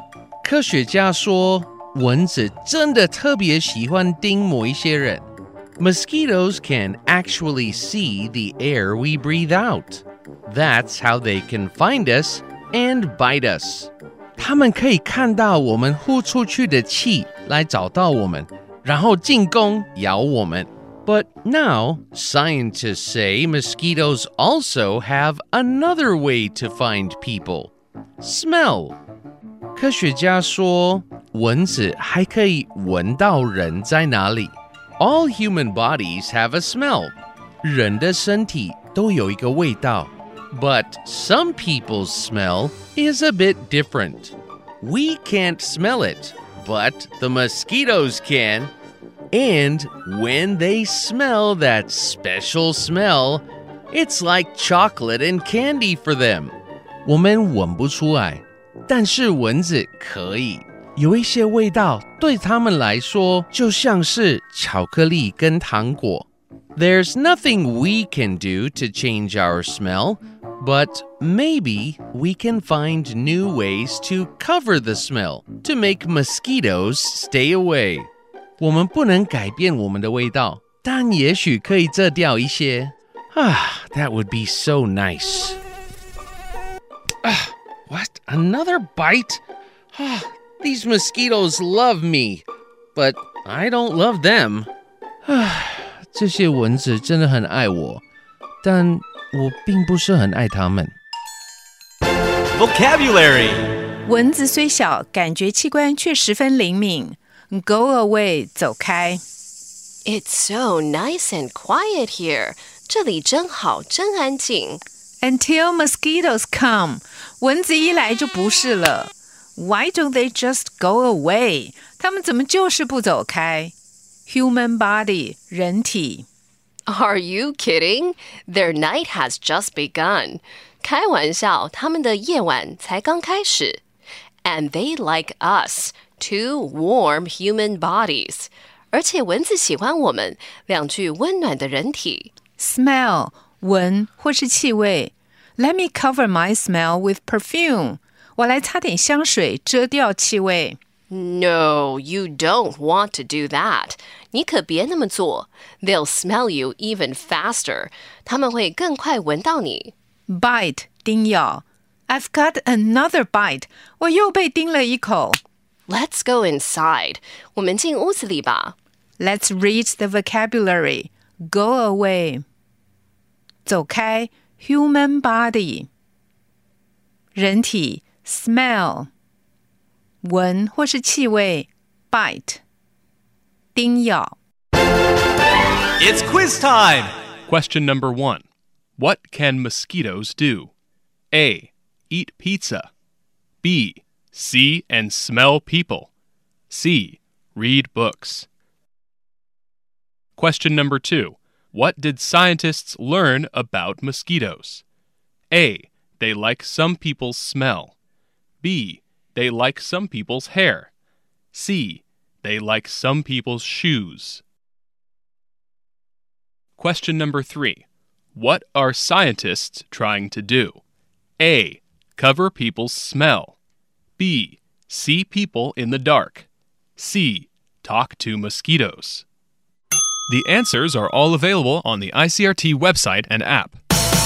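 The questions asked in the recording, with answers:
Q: What can mosquitoes do?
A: B: See and smell people.

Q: What did scientists learn about mosquitoes?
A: A: They like some people's smell.

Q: What are scientists trying to do?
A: A: Cover people's smell.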